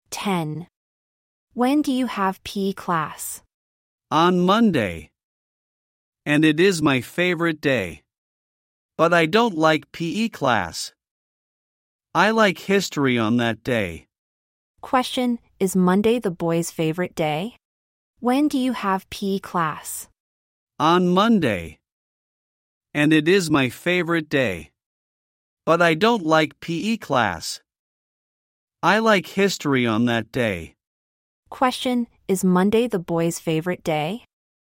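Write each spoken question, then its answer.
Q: Question: Is Monday the boy's favorite day?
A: Yes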